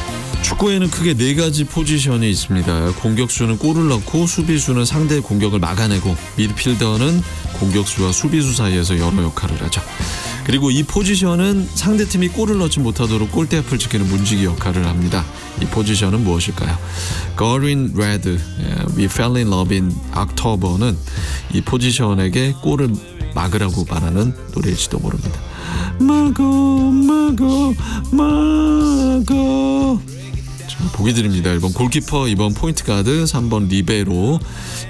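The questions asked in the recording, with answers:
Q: 이 포지션은 무엇일까요?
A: 1: 골키퍼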